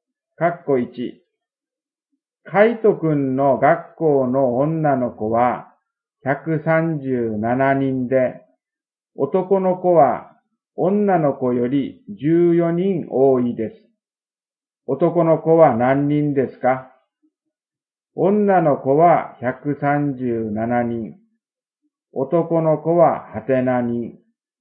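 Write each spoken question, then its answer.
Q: 男の子は何人ですか?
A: 151人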